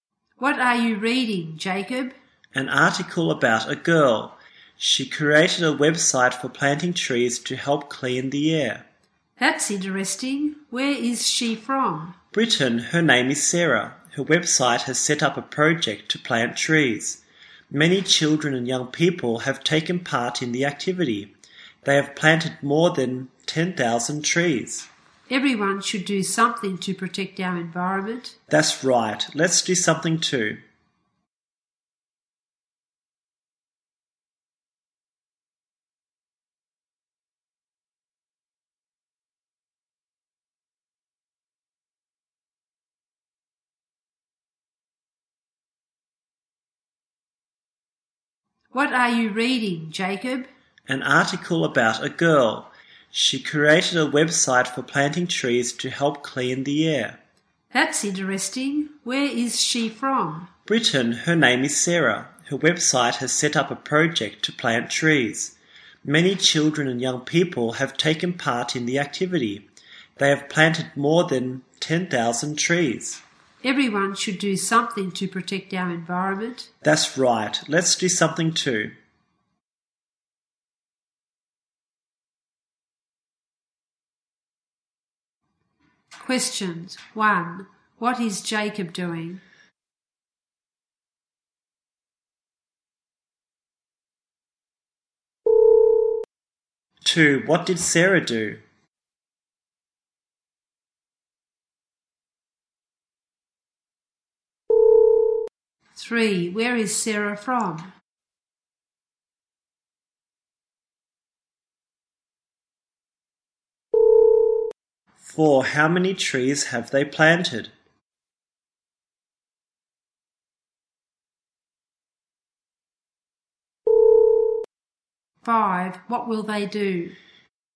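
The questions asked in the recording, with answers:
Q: What is Jacob doing?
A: Reading an article about a girl

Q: What did Sarah do?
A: She created a website for planting trees

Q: Where is Sarah from?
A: Britain

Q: How many trees have they planted?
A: More than 10,000

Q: What will they do?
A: Do something to protect the environment too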